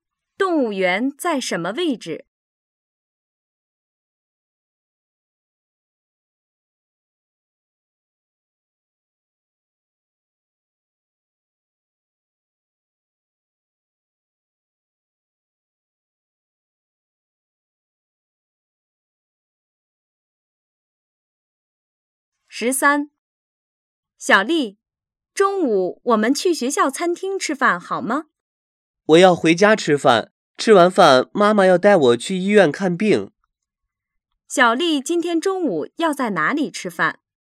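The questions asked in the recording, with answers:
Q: 小丽今天中午要在哪里吃饭?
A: 家里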